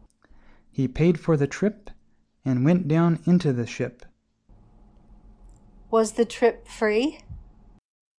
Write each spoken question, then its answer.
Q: Was the trip free?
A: No, he paid for the trip.